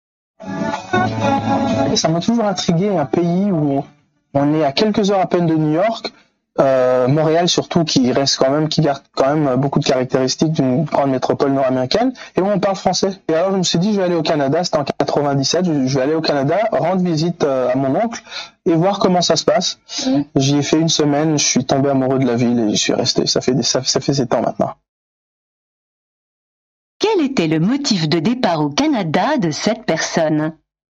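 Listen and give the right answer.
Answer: Rendre visite à son oncle et découvrir ce pays francophone d'Amérique du Nord qui l'intriguait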